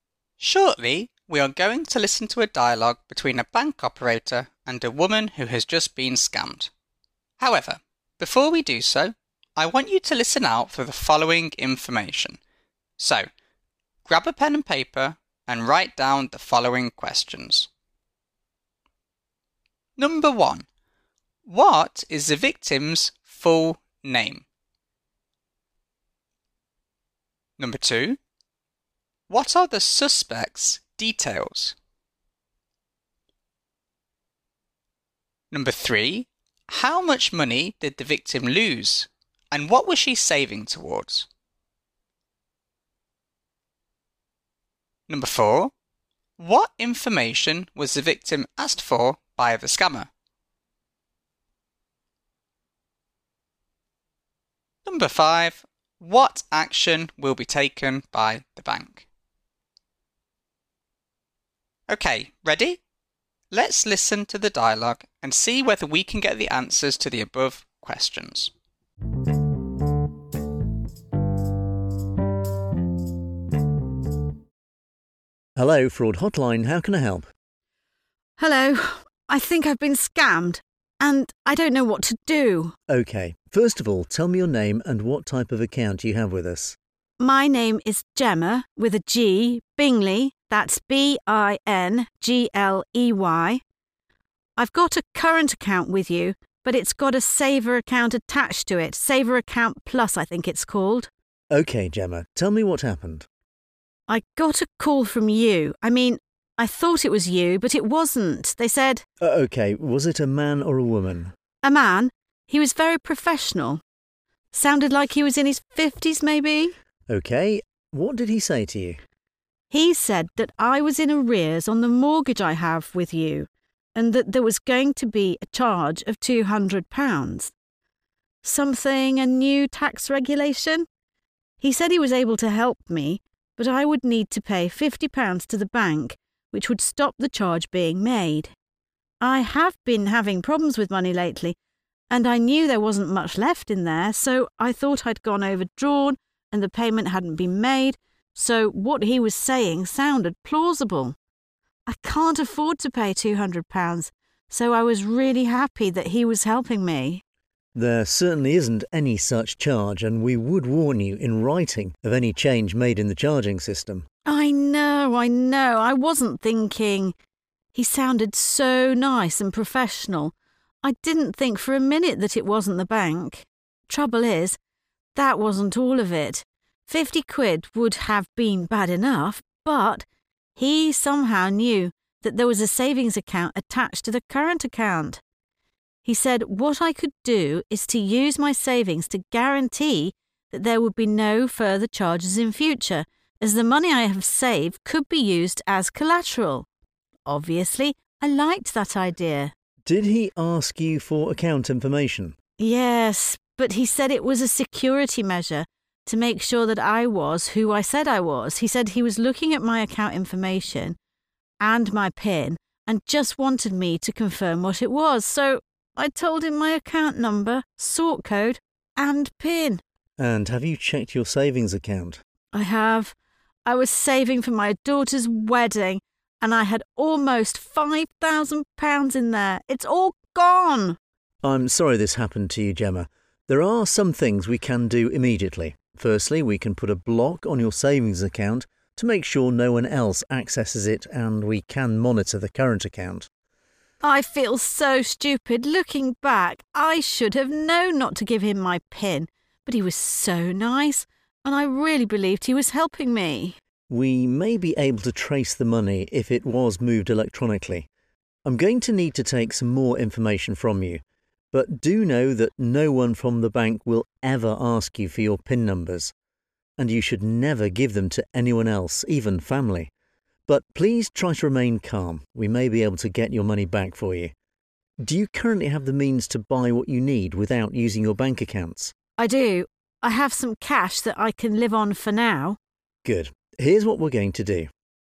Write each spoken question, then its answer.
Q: What is the victim's full name?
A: As we heard, the victim's full name was Gemma Bingley.

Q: What are the suspect's details?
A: As we heard, the suspect was male, professional, and sounded as though he was in his mid-50s.

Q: How much money did the victim lose and what was she saving towards?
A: As we heard, the victim lost nearly £5,000 and had been saving towards her daughter's wedding.

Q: What information was the victim asked for by the scammer?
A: As we heard, the scammer asked for Gemma's account number, sort code, and PIN.

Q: What action will be taken by the bank?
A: As we heard, the bank will monitor her current account and block her savings account to stop anyone else accessing it.